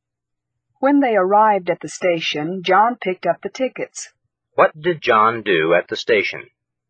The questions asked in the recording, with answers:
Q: What did John do at the station?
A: John picked up the tickets at the station.